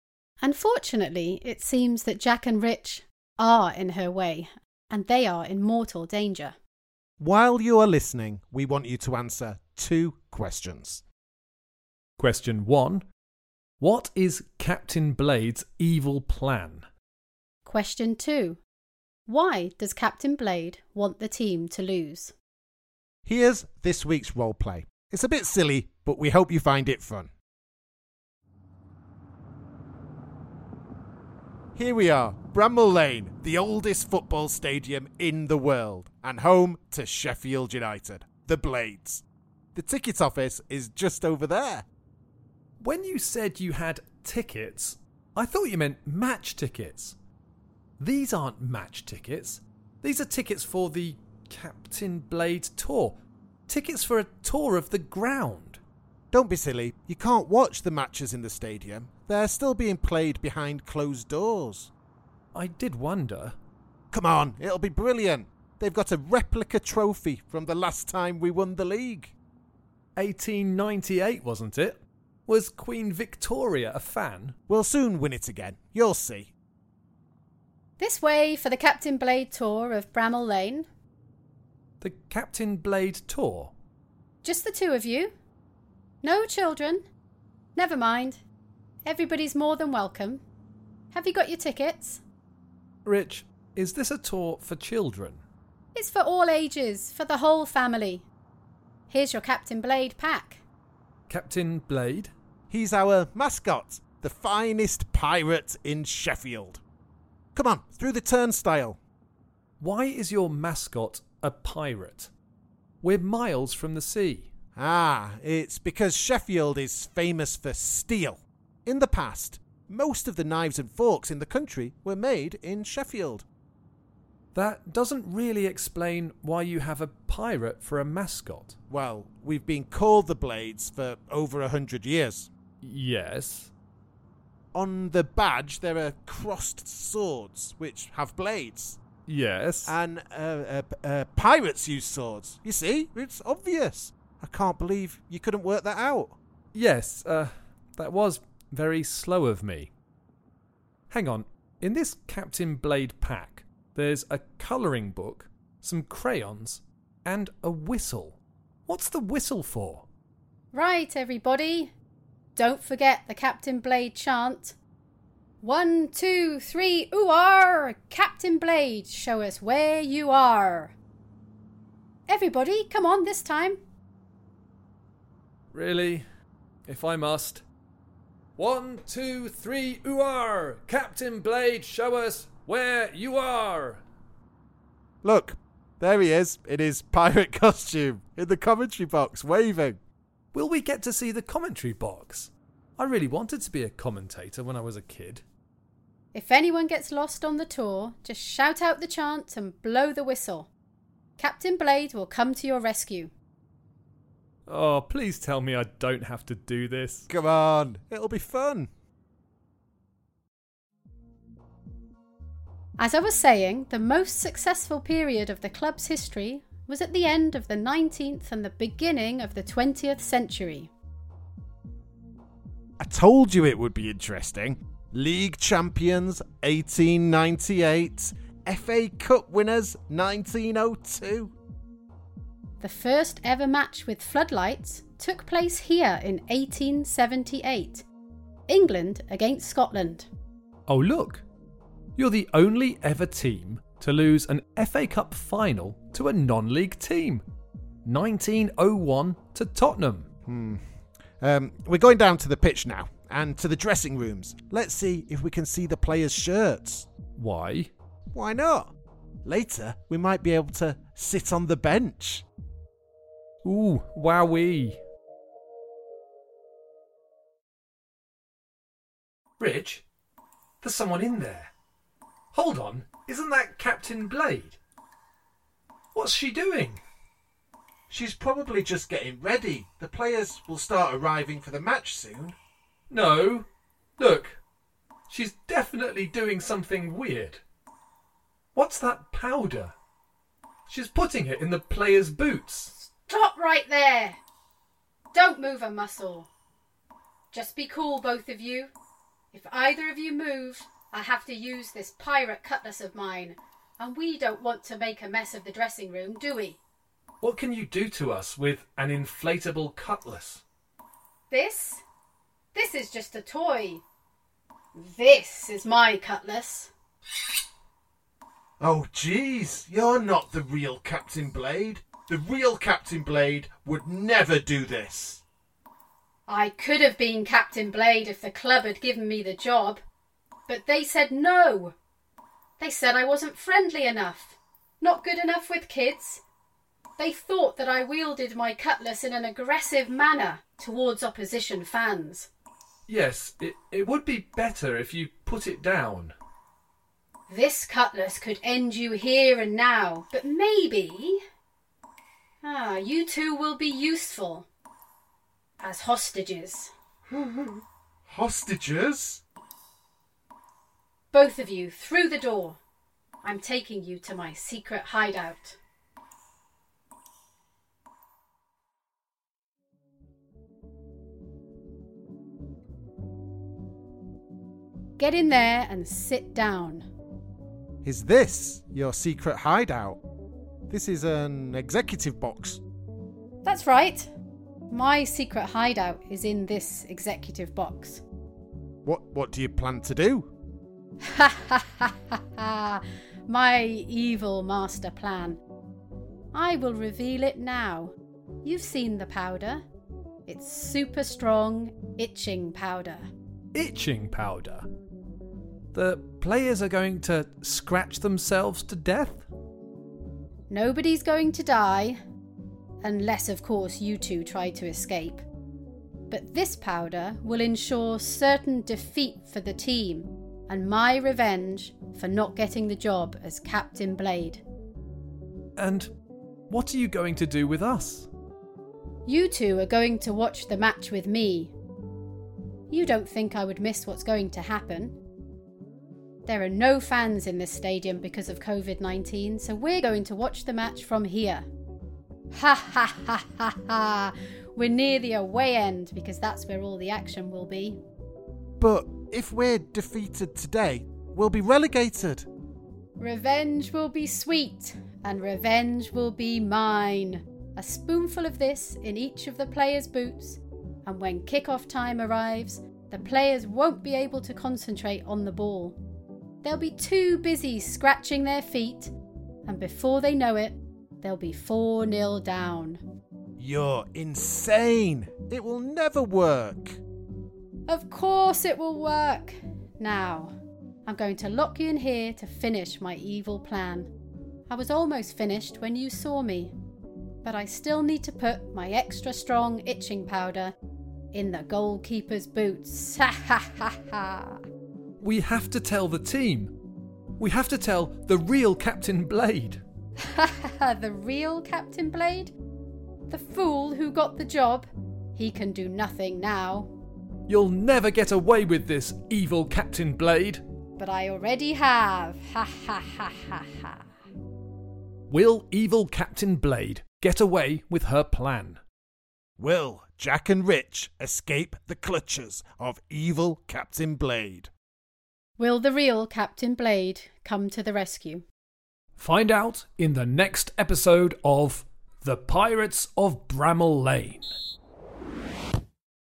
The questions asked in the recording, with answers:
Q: what is Captain Blade's evil plan?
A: Well, her plan is to put itching powder in all of the Sheffield United players' boots.

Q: Why does Captain Blade want the team to lose?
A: She wanted to be Captain Blade, but she didn't get the job as the mascot.